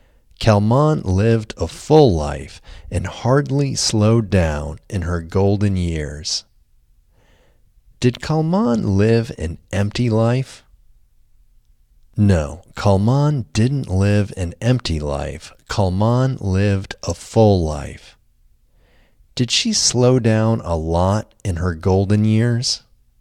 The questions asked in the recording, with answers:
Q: Did she slow down a lot in her golden years?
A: No, she didn't slow down a lot in her golden years.